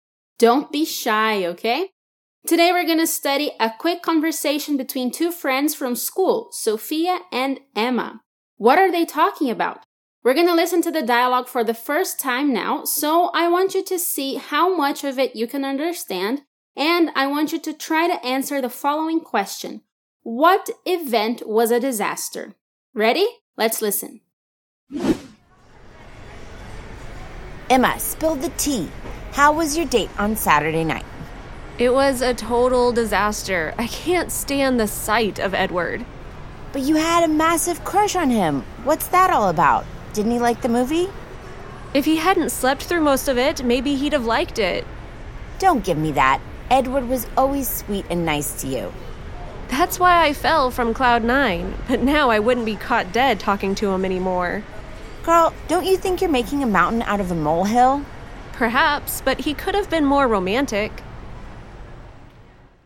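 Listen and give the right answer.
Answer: Emma's date with Edward on Saturday night (at the movies)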